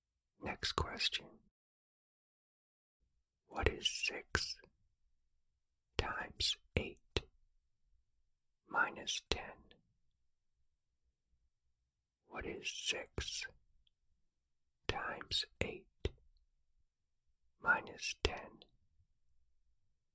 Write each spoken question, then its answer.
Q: What is 6 times 8 minus 10?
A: The answer is 38.